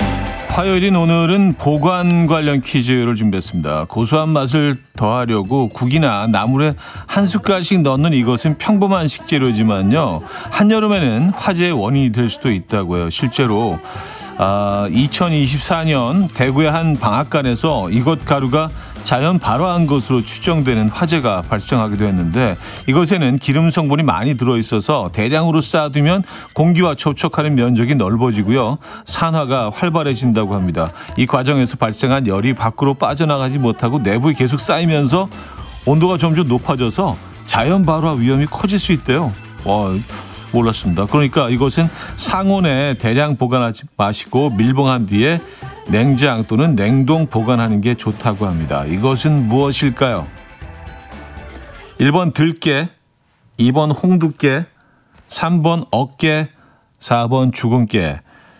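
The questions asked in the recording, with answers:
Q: 이것은 무엇일까요? 1번 들깨, 2번 홍두깨, 3번 어깨, 4번 주근깨.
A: 1번: 들깨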